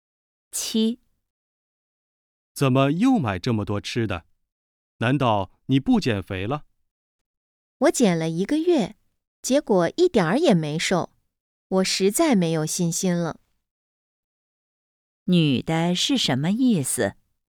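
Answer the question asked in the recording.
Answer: 她对减肥没有信心了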